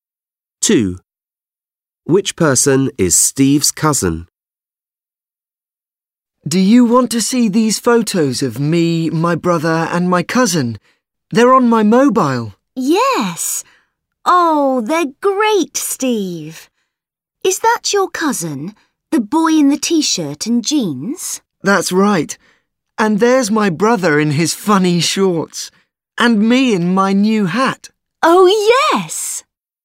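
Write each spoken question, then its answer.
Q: Which person is Steve's cousin?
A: The boy in the t-shirt and jeans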